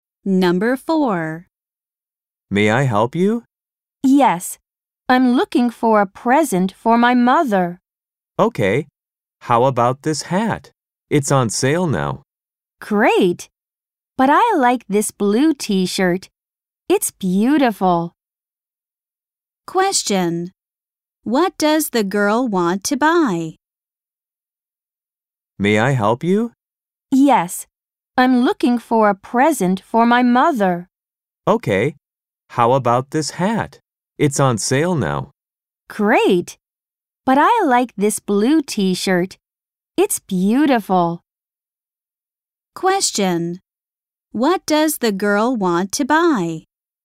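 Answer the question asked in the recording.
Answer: A blue t-shirt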